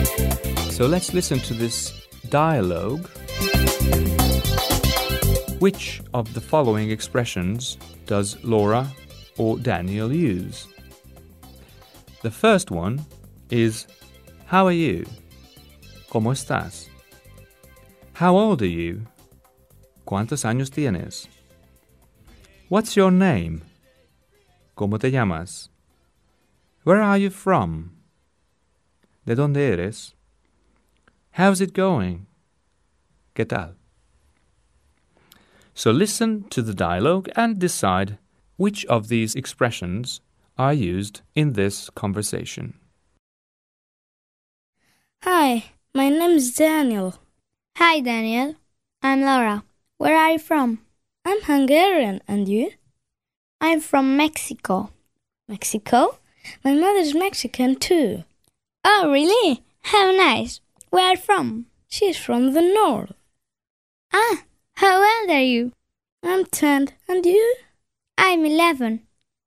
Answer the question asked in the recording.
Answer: The first is, how old are you? And the other one was, where are you from?